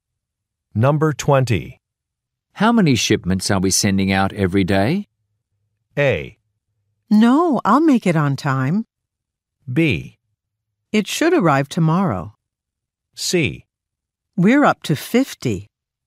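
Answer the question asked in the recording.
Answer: C: We're up to 50.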